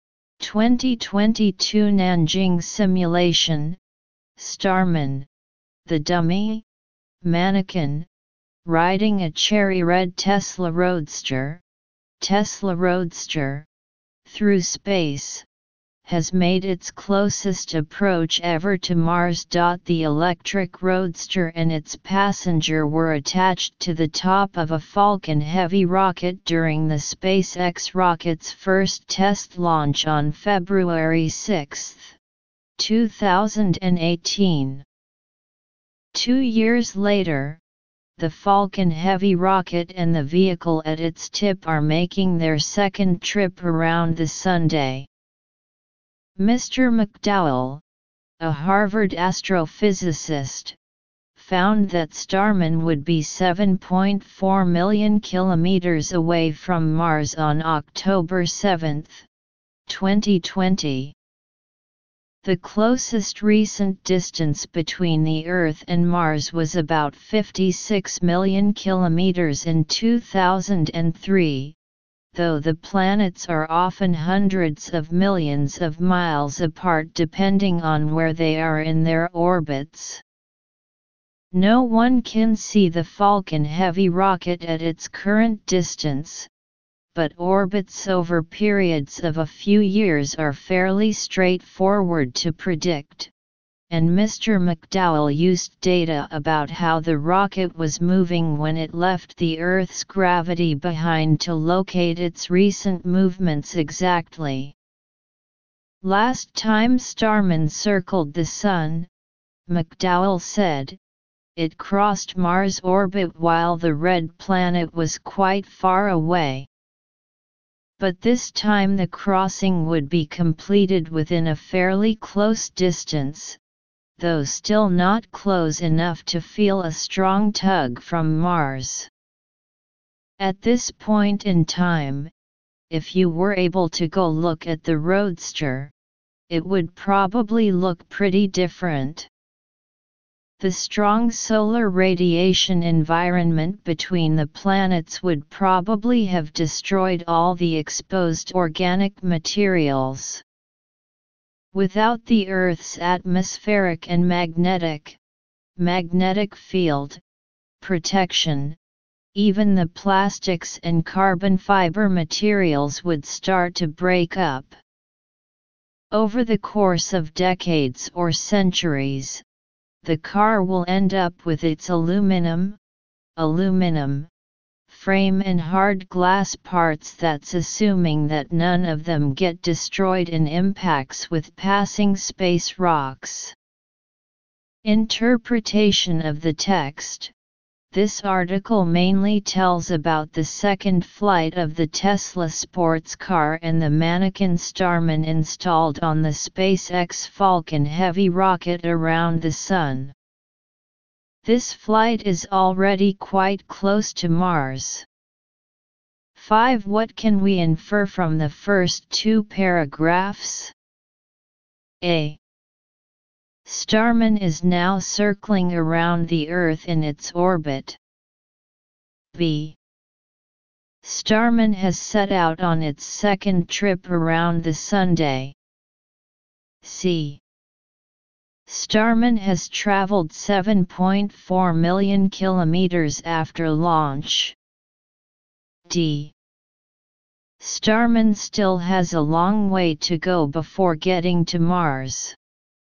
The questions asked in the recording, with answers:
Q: What can we infer from the first two paragraphs?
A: Choose B.